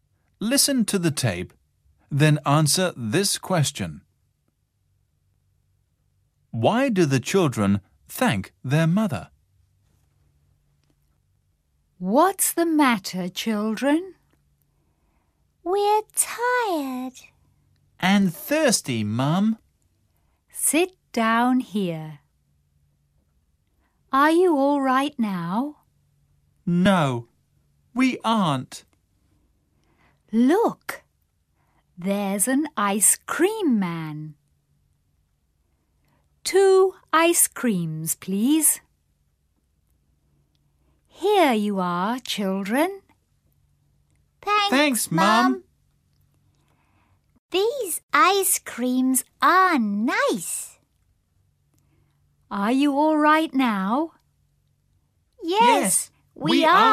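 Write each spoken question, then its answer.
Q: Why do the children thank their mother?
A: Because she buys them ice creams.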